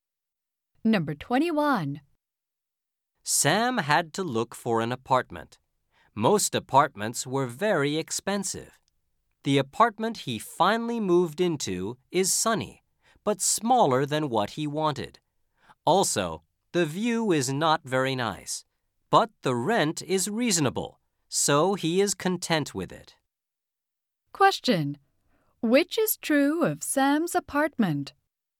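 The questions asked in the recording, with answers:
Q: Which is true of Sam's apartment?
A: It is sunny and the rent is reasonable, but it is small.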